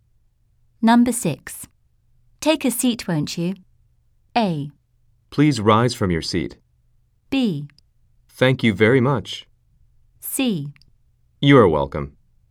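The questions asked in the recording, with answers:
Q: Take a seat, won't you?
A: B: Thank you very much.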